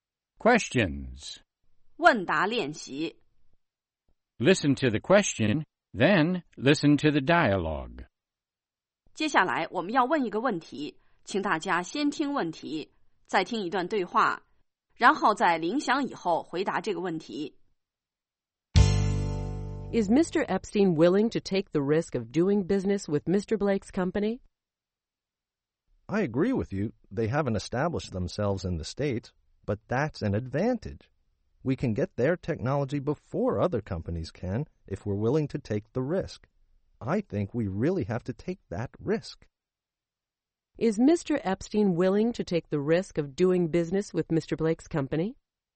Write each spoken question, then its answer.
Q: Is Mr. Epstein willing to take the risk of doing business with Mr. Blake's company?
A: Yes, he is. He thinks they really have to take that risk.